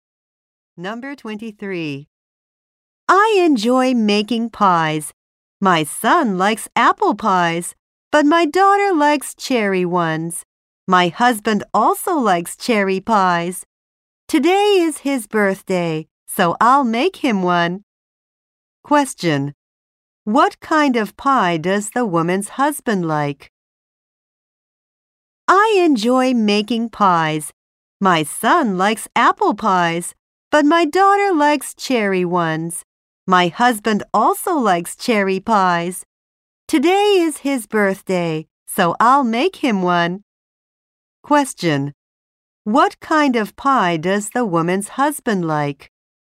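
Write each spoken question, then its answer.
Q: What kind of pie does the woman's husband like?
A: Cherry pie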